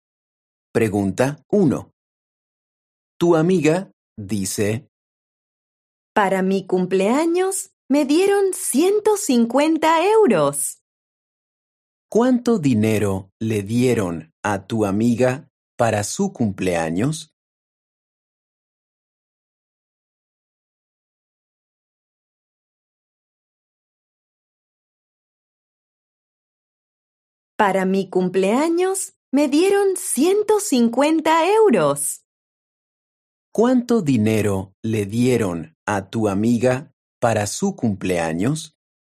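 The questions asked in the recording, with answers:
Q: ¿Cuánto dinero le dieron a tu amiga para su cumpleaños?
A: 150 euros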